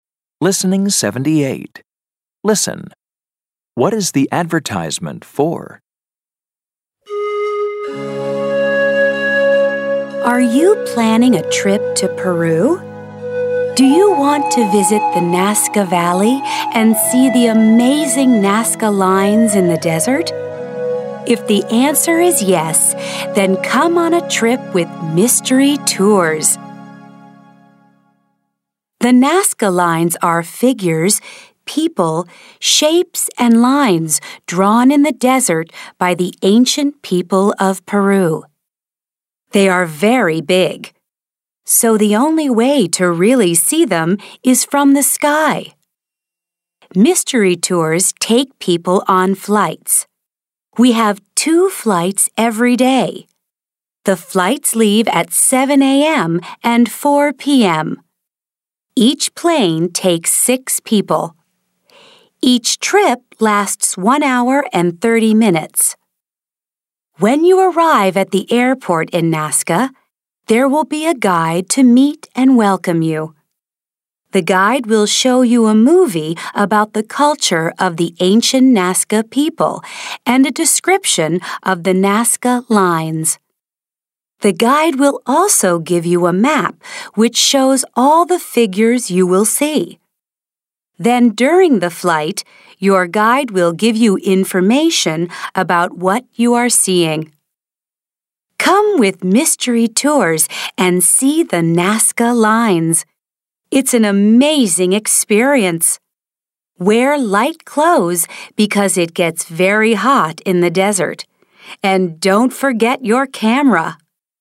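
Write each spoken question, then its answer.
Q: What is the advertisement for?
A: Flights over the Nazca lines in Peru with Mystery Tours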